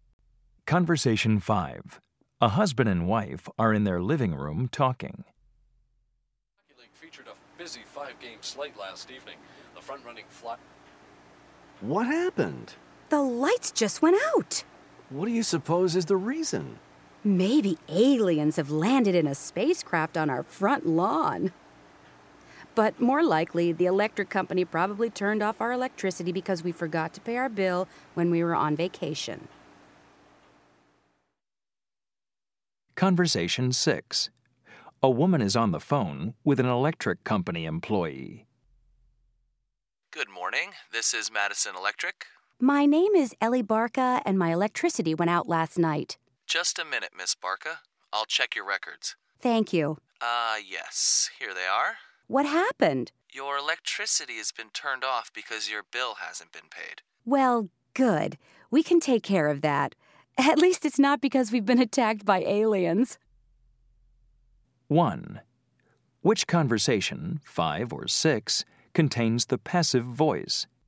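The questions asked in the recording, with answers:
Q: Which conversation, 5 or 6, contains the passive voice?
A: Conversation 6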